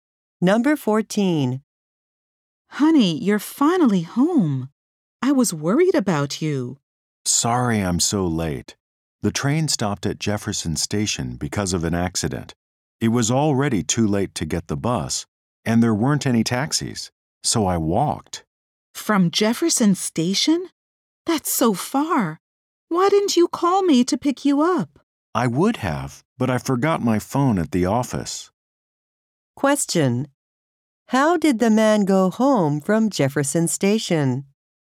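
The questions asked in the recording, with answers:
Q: How did the man go home from Jefferson Station?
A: He walked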